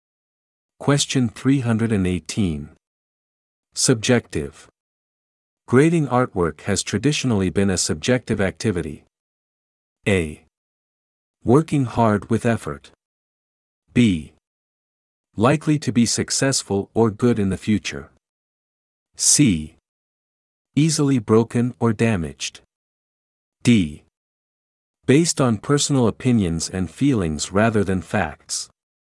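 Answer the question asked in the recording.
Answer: D: Based on personal opinions and feelings rather than facts.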